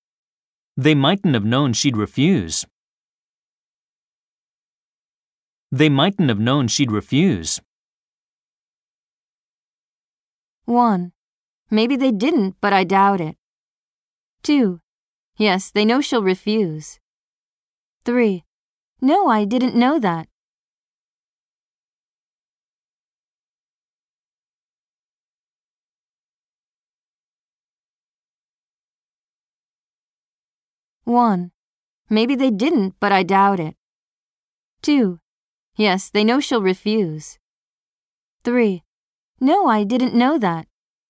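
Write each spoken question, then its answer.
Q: They mightn't have known she'd refuse.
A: 1: Maybe they didn't, but I doubt it.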